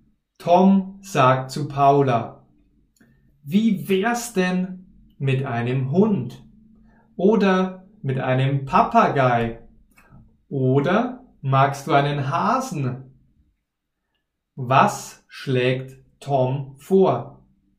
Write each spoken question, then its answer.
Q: Was schlägt Tom vor?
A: Er schlägt einen Hund, Papagei und Hasen vor.